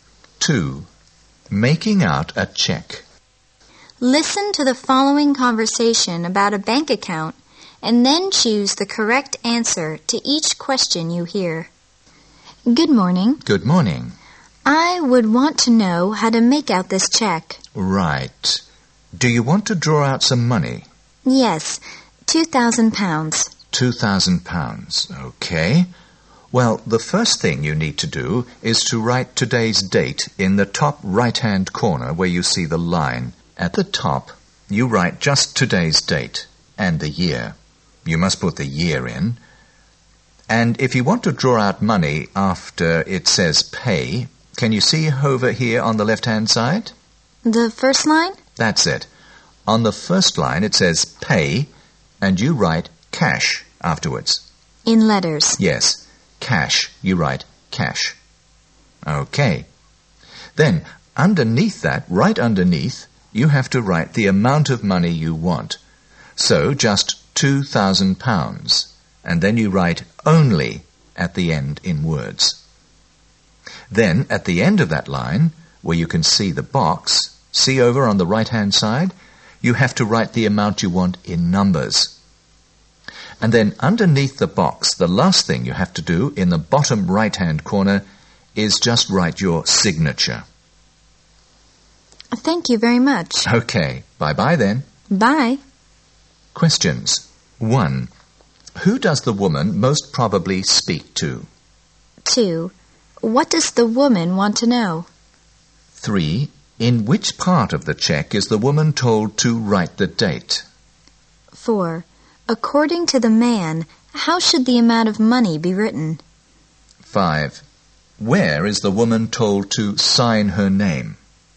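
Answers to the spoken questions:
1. A bank clerk
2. How to make out a check
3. The top right-hand corner
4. In both words and numbers
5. The bottom right-hand corner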